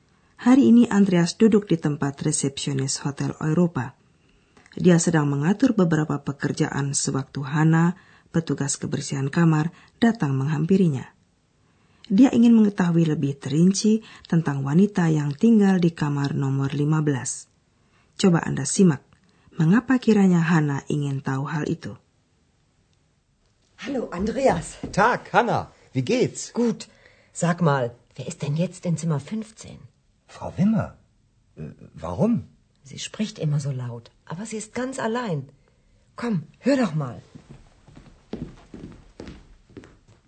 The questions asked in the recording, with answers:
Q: Coba Anda simak, mengapa kiranya Hana ingin tahu hal itu.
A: Hana ingin mengetahui penghuni kamar nomor 15 karena dia selalu mendengar suara seorang wanita berbicara keras di kamar itu.